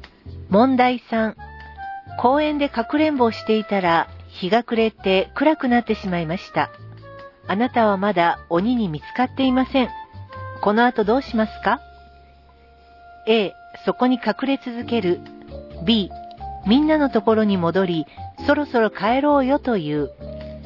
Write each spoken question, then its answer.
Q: この後どうしますか?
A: 正解は B. みんなにそろそろ帰ろうよと言いましょう。